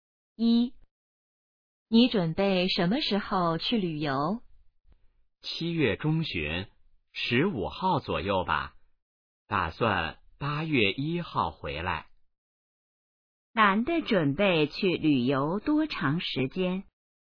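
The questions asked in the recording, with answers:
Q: 男的准备去旅游多长时间?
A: 半个月左右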